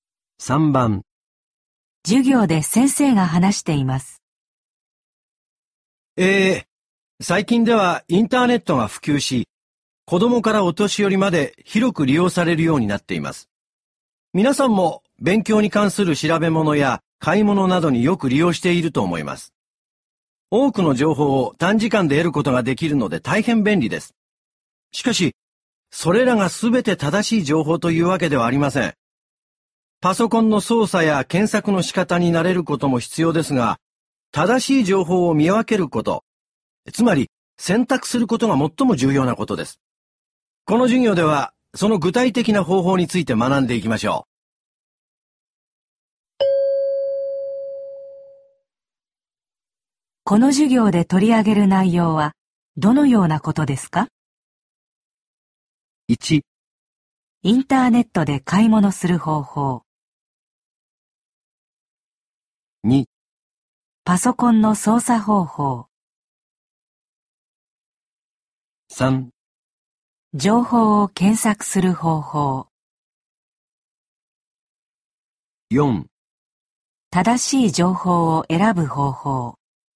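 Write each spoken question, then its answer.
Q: この授業で取り上げる内容はどのようなことですか?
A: 4: 正しい情報を選ぶ方法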